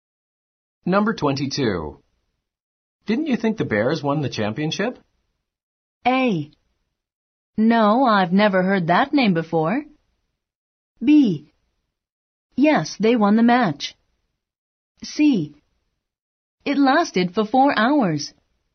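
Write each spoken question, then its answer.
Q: Didn't you think the Bears won the championship?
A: B: Yes, they won the match.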